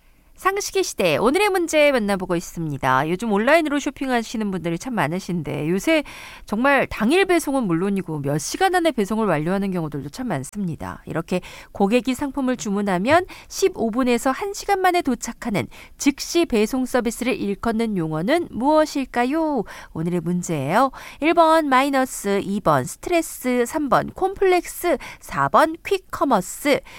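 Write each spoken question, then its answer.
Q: 이렇게 고객이 상품을 주문하면 15분에서 1시간 만에 도착하는 즉시 배송 서비스를 일컫는 용어는 무엇일까요?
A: 4: 퀵커머스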